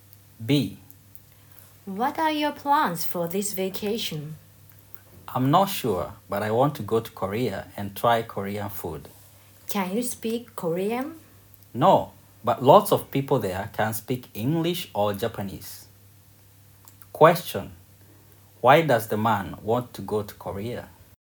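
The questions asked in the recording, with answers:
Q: Why does the man want to go to Korea?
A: To try Korean food.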